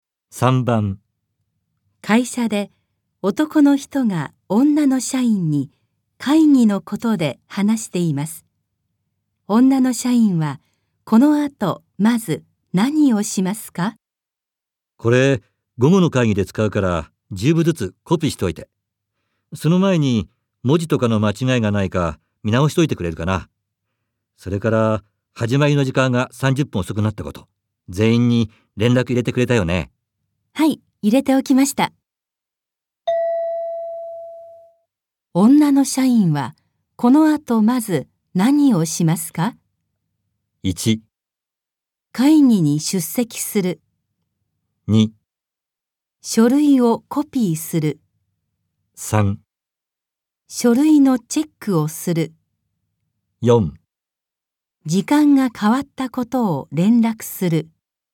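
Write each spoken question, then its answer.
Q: 女の社員はこの後まず何をしますか?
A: 3: 書類のチェックをする。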